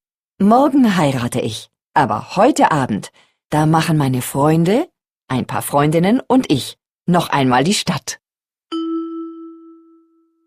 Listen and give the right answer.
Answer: Unsicher.